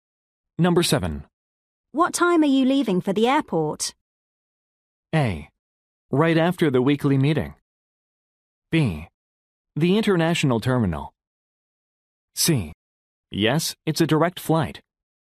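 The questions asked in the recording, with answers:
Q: What time are you leaving for the airport?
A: A: Right after the weekly meeting.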